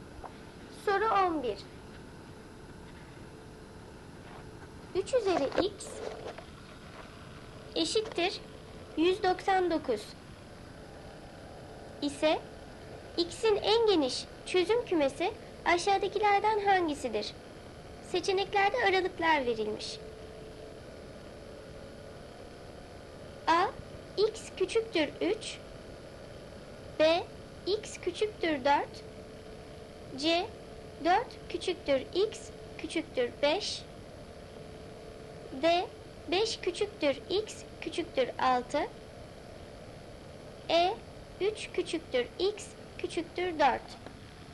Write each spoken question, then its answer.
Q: 3 üzeri x eşittir 199 ise x'in en geniş çözüm kümesi aşağıdakilerden hangisidir?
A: Doğru cevap C seçeneği. 4 küçüktür x küçüktür 5.